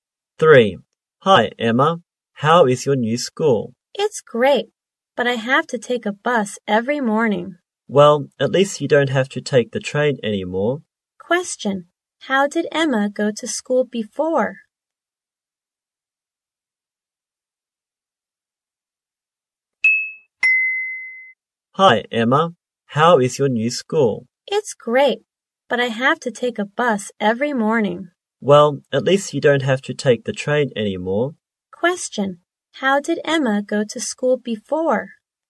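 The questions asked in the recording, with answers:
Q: Question. How did Emma go to school before?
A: By train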